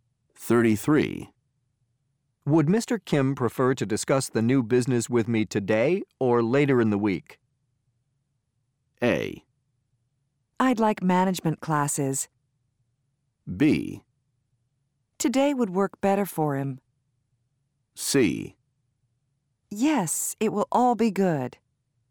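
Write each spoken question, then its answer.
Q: Would Mr. Kim prefer to discuss the new business with me today or later in the week?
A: B: Today would work better for him.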